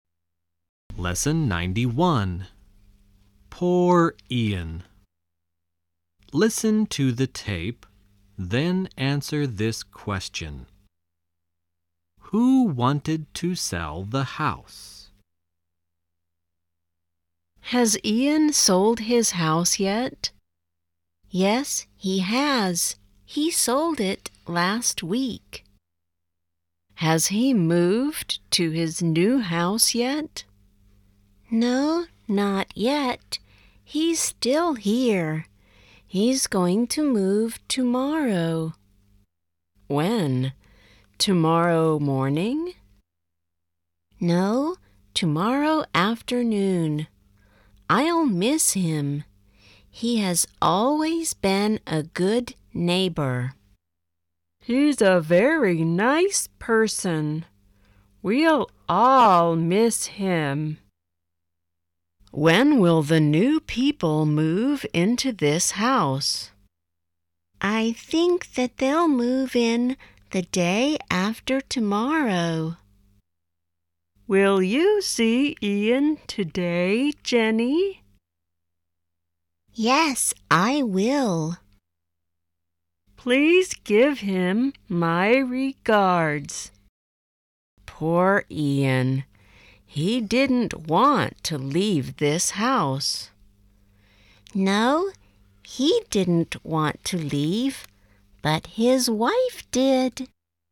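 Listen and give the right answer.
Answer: Ian's wife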